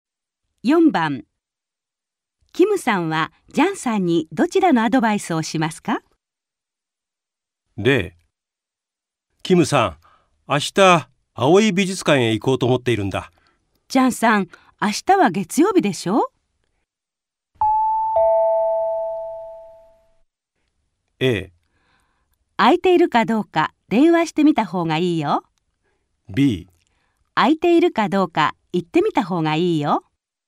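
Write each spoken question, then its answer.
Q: キムさんはジャンさんにどちらのアドバイスをしますか?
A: A: 空いているかどうか電話してみた方がいいよ。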